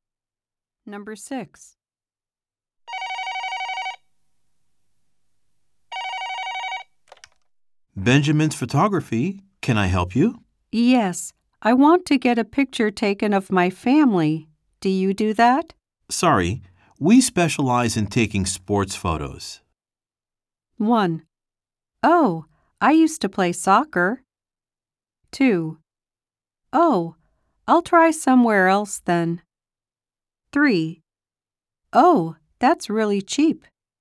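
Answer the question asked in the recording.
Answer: 2: Oh, I'll try somewhere else then.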